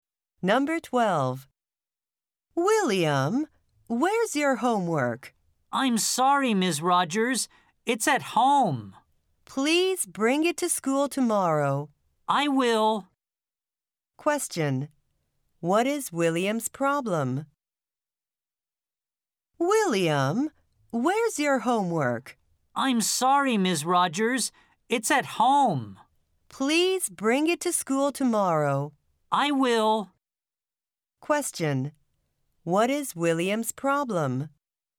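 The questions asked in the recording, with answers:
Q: What is William's problem?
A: He left his homework at home.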